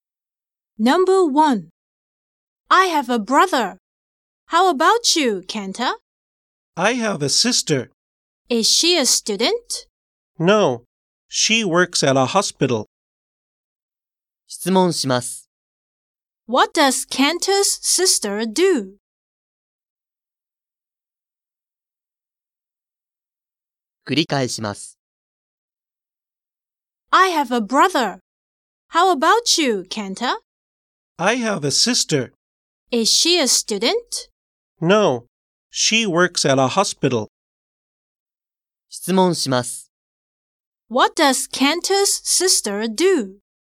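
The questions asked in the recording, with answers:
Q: What does Kenta's sister do?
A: She works at a hospital.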